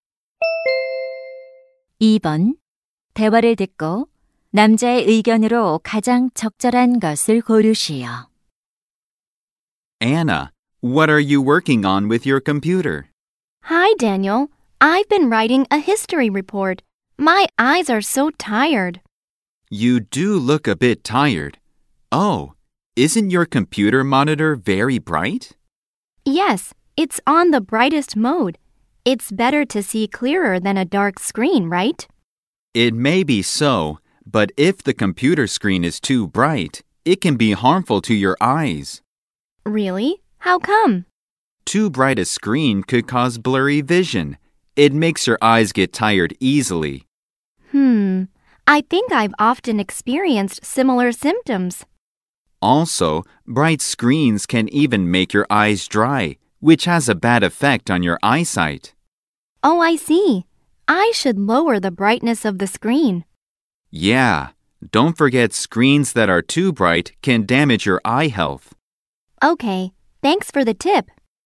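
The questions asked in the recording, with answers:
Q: 대화를 듣고 남자의 의견으로 가장 적절한 것을 고르시오.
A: 지나치게 밝은 컴퓨터 화면은 눈 건강을 해칠 수 있다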